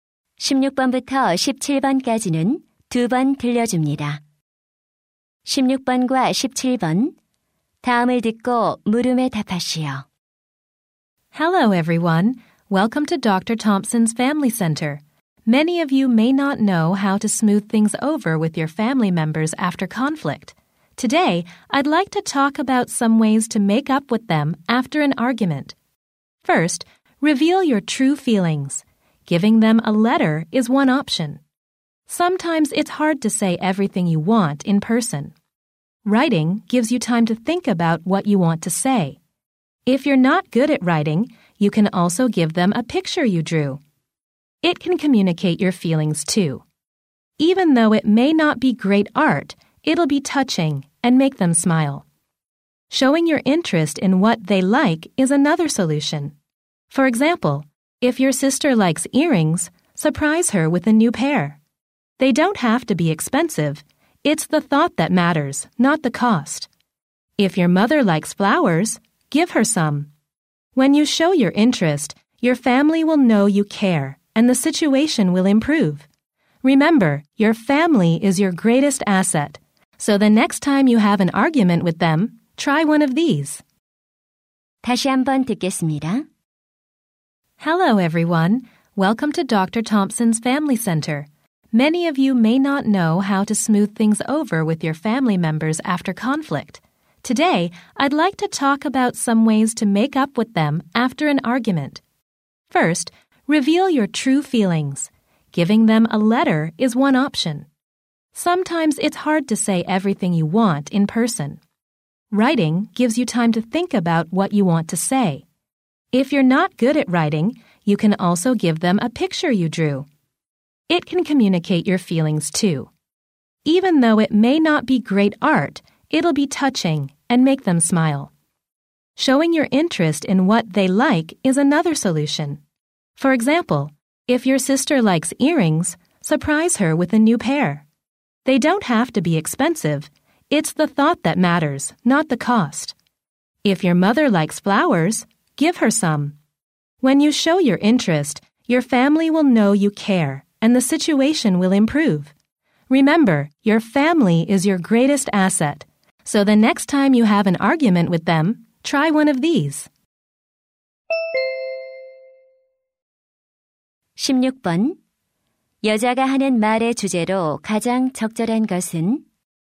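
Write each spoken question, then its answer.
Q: 여자가 하는 말의 주제로 가장 적절한 것은?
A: 말다툼 후 가족과 화해하는 방법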